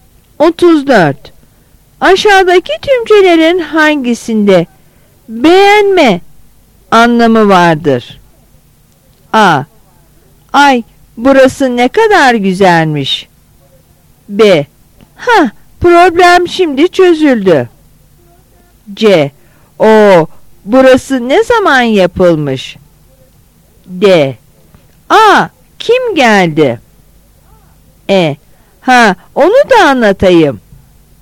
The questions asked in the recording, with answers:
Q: Aşağıdaki tümcelerin hangisinde beğenme anlamı vardır?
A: Yanıt A.